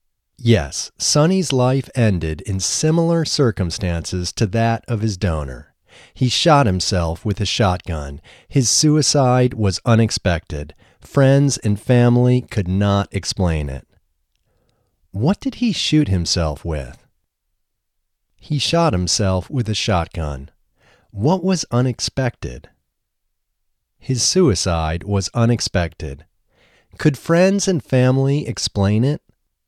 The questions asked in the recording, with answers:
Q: What did he shoot himself with?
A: He shot himself with a shotgun.

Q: What was unexpected?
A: His suicide was unexpected.

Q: Could friends and family explain it?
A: No, friends and family could not explain it.